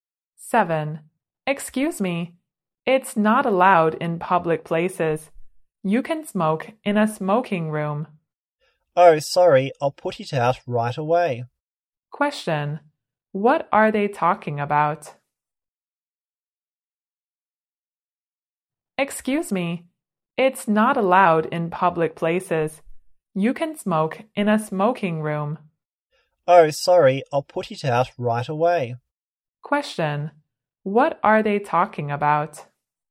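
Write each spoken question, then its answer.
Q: Question, what are they talking about?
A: Smoking (in public places)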